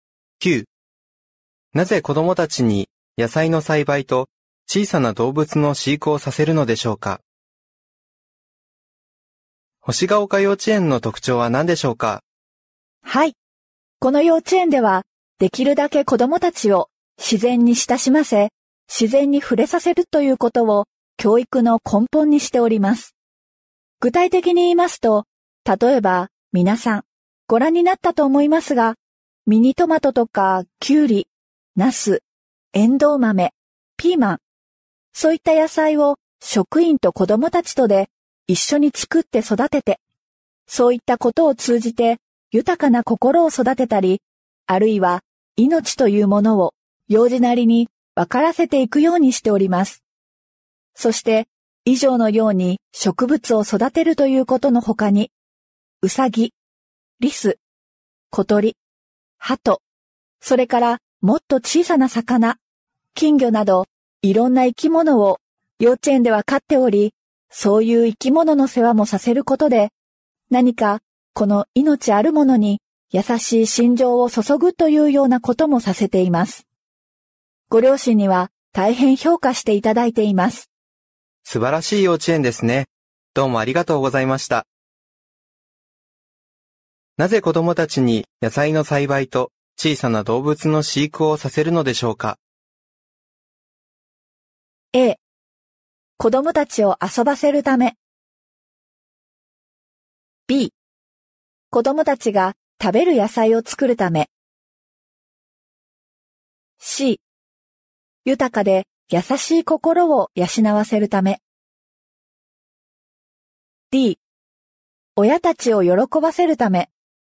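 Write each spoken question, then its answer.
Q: なぜ子供たちに野菜の栽培と小さな動物の飼育をさせるのでしょうか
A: C: 豊かで優しい心を養わせるため。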